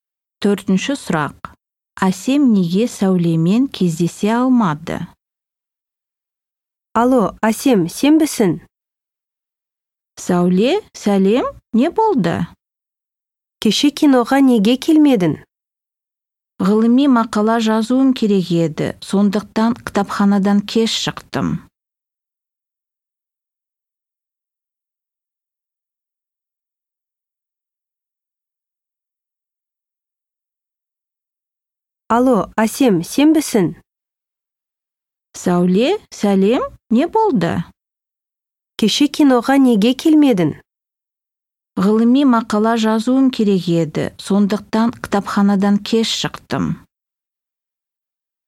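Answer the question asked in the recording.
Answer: ғылыми мақала жазып, кітапханадан кеш шықты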